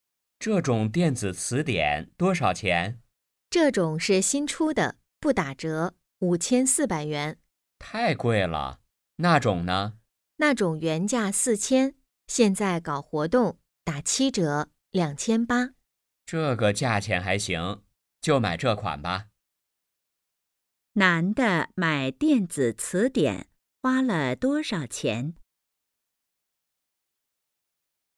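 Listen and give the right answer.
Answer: 2800元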